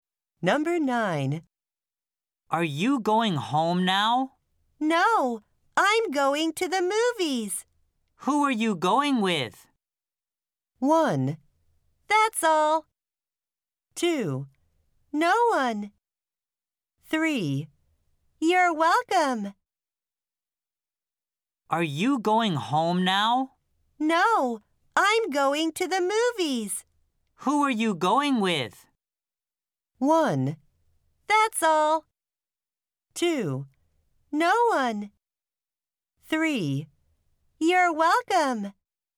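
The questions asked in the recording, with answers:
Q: Who are you going with?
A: 2: No one.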